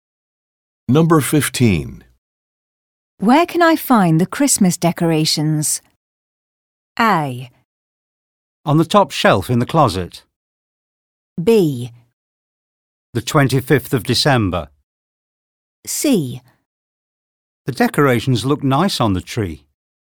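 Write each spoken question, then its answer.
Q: Where can I find the Christmas decorations?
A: A: On the top shelf in the closet.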